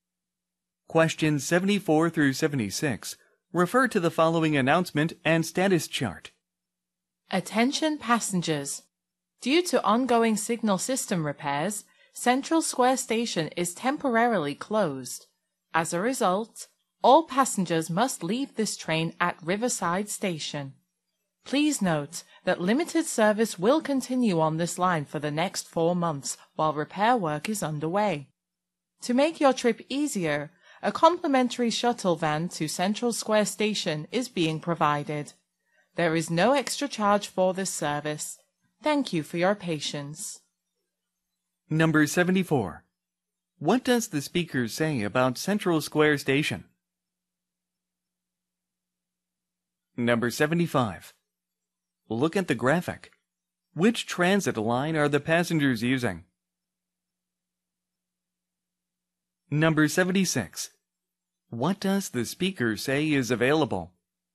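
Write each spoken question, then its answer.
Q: What does the speaker say about Central Square Station?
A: It is temporarily closed due to signal system repairs.

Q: What does the speaker say is available?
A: A free shuttle van to Central Square Station.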